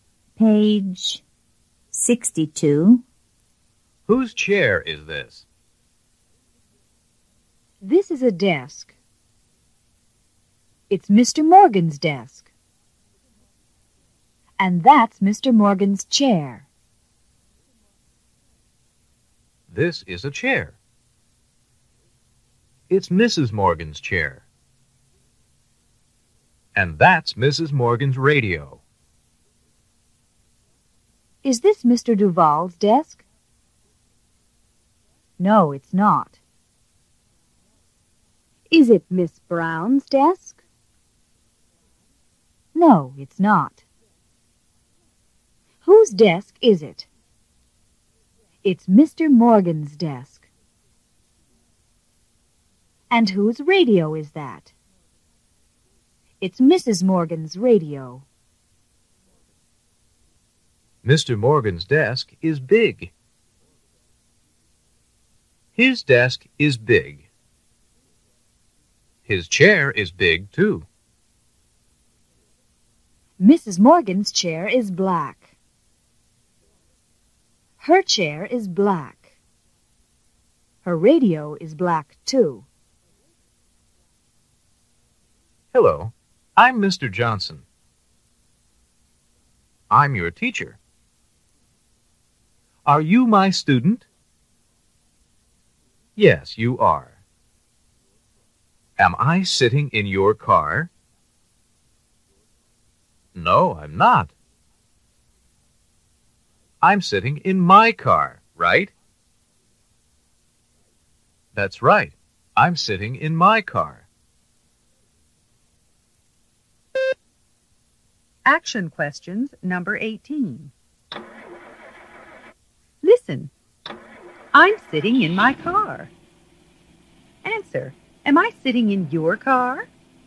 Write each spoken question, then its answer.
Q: am I sitting in your car?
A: No, you're not.